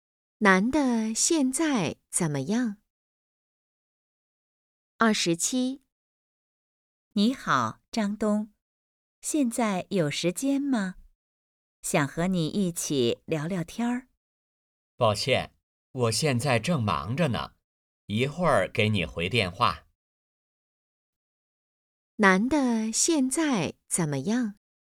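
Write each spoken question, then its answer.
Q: 男的现在怎么样?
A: 很忙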